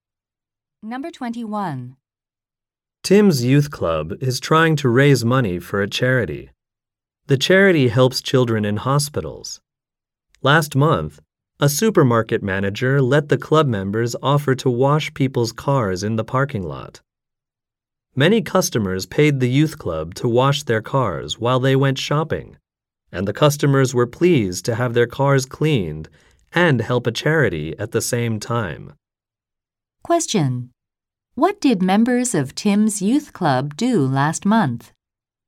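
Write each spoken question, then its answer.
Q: What did members of Tim's youth club do last month?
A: They washed people's cars in a supermarket parking lot for charity.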